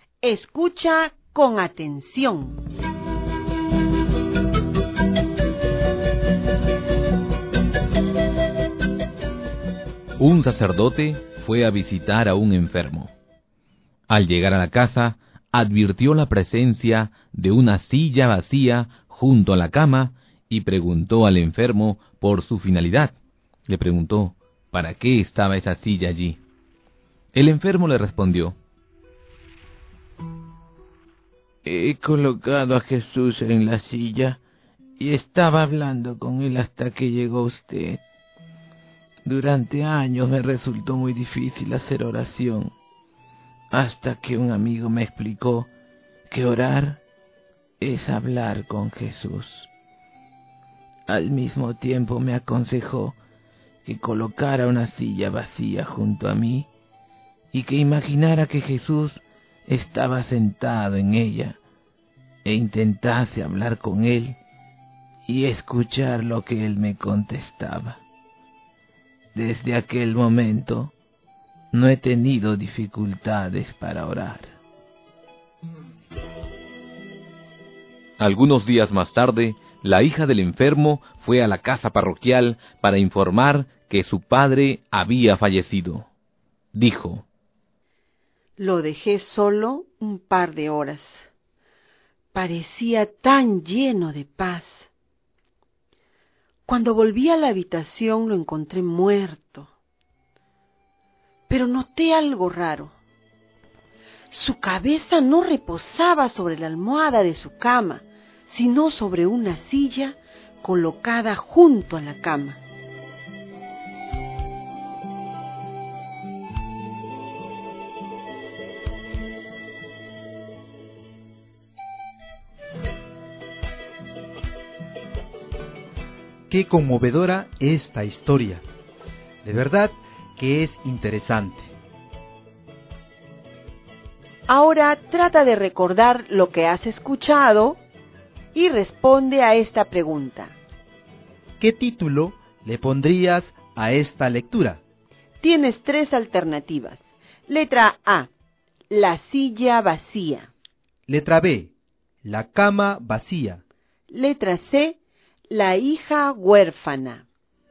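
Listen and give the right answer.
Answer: A: la silla vacía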